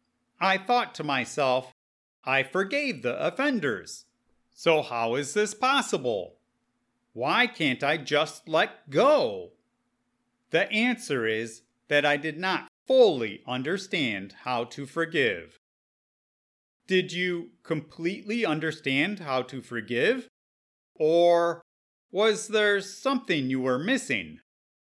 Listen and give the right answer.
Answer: I did not fully understand how to forgive.